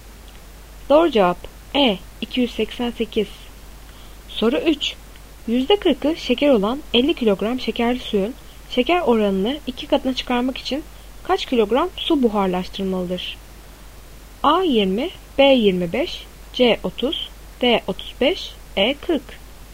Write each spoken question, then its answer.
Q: %40'ı şeker olan 50 kilogram şekerli suyun şeker oranını 2 katına çıkarmak için kaç kilogram su buharlaştırmalıdır?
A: Doğru cevap B 25.